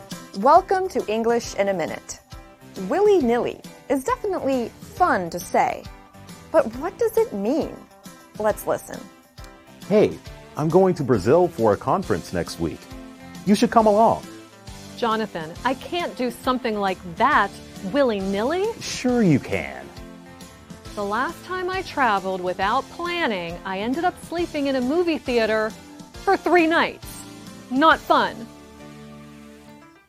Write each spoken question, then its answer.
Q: Willy-nilly is definitely fun to say, but what does it mean?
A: willy-nilly describes something we do quickly and carelessly, without much thought or planning.